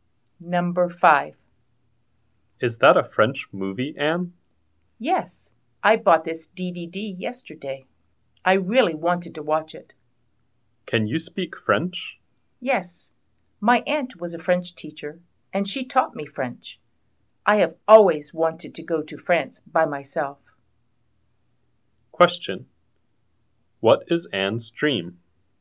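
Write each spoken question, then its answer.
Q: What is Anne's dream?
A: To go to France by herself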